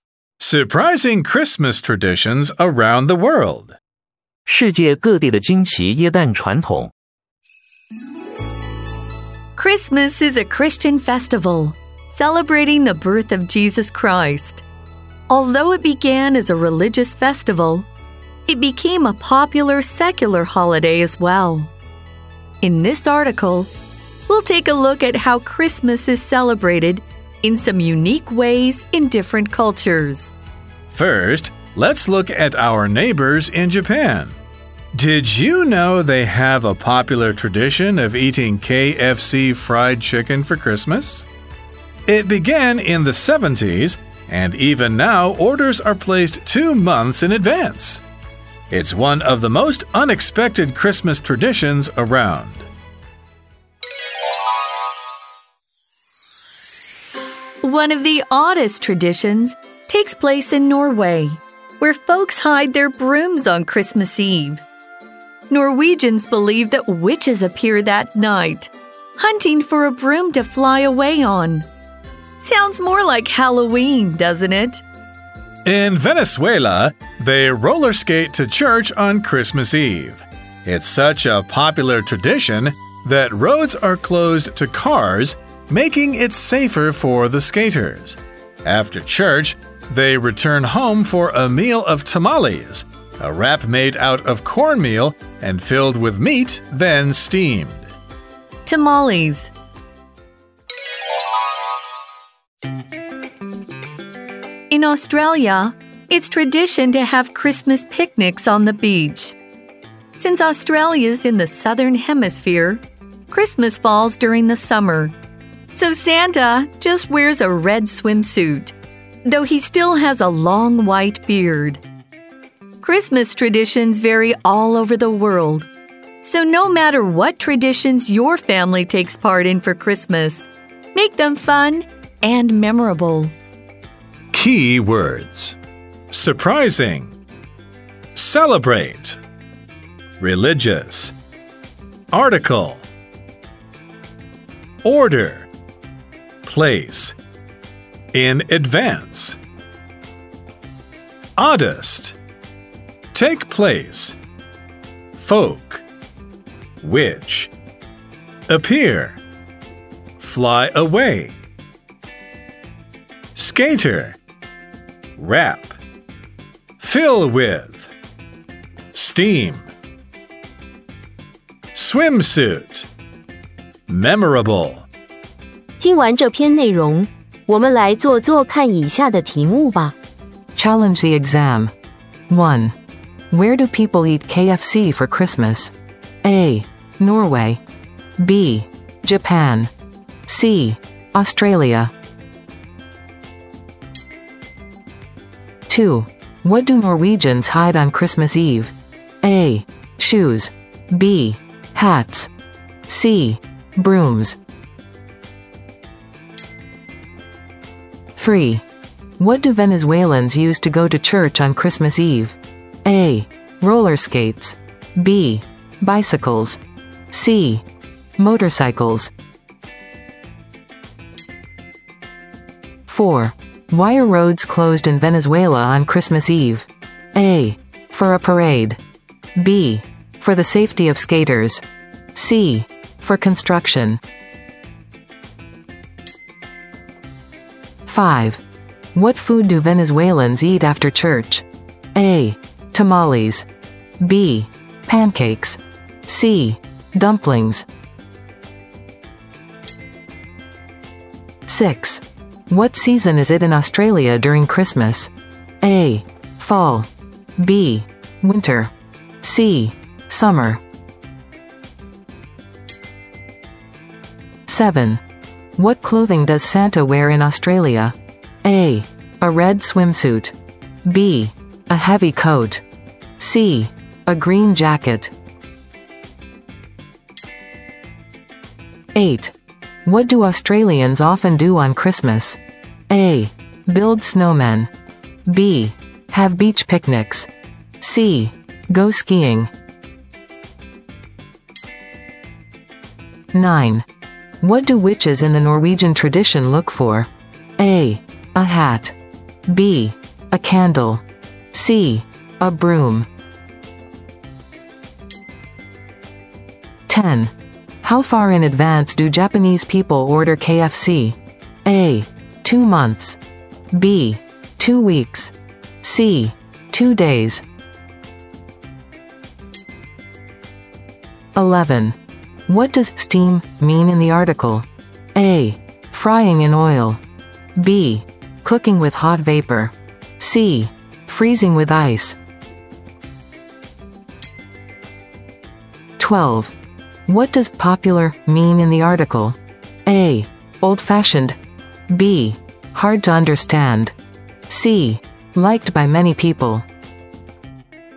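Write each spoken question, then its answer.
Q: Where do people eat KFC for Christmas?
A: B: Japan.

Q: What do Norwegians hide on Christmas Eve?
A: C: Brooms.

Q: What do Venezuelans use to go to church on Christmas Eve?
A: A: Roller skates.

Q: Why are roads closed in Venezuela on Christmas Eve?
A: B: For the safety of skaters.

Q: What food do Venezuelans eat after church?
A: A: Tamales.

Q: What season is it in Australia during Christmas?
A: C: Summer.

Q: What clothing does Santa wear in Australia?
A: A: A red swimsuit.

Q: What do Australians often do on Christmas?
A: B: Have beach picnics.

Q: What do witches in the Norwegian tradition look for?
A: C: A broom.

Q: How far in advance do Japanese people order KFC?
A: A: 2 months.

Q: What does steam mean in the article?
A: B: Cooking with hot vapor.

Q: What does popular mean in the article?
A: C: Liked by many people.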